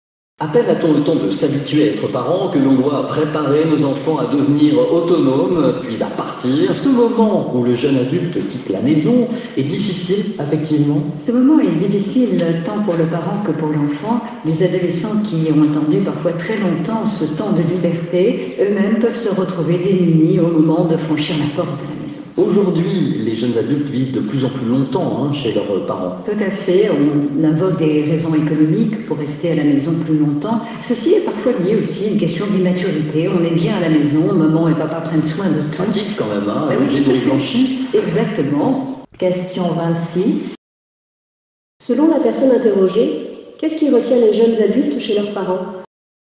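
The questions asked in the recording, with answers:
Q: Selon la personne interrogée, qu'est-ce qui retient les jeunes adultes chez leurs parents ?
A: Des raisons économiques et parfois l'immaturité : ils sont bien à la maison, les parents prennent soin de tout.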